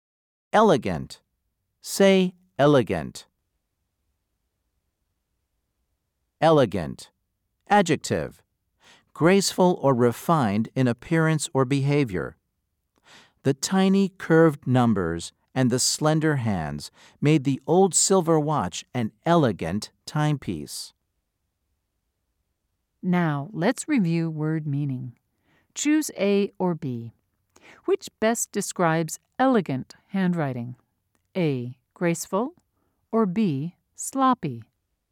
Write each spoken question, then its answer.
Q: Choose A or B. Which best describes elegant handwriting?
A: If you said A, you were right.